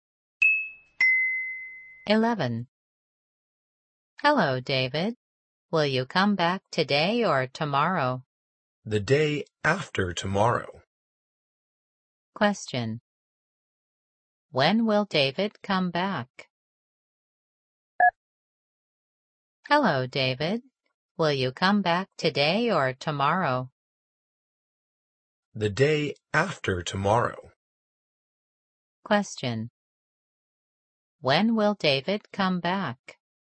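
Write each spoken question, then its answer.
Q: When will David come back?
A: The day after tomorrow.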